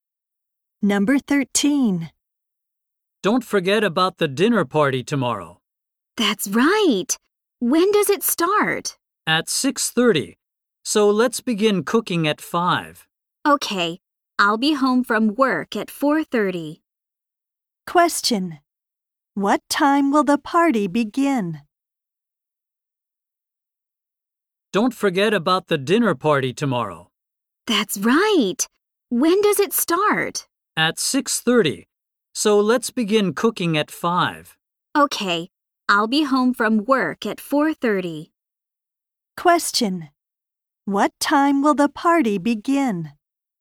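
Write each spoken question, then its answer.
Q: What time will the party begin?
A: At 6:30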